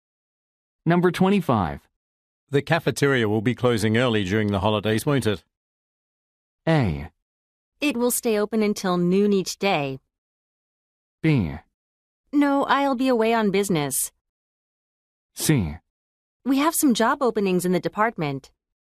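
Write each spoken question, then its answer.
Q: The cafeteria will be closing early during the holidays, won't it?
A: A: It will stay open until noon each day.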